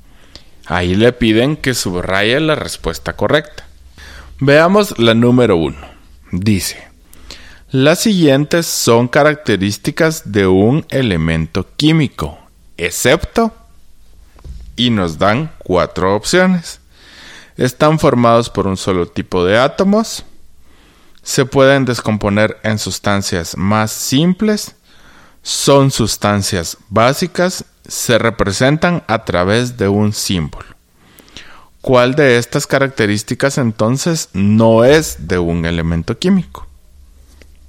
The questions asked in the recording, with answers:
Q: ¿Cuál de estas características entonces no es de un elemento químico?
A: Muy bien, es la segunda opción.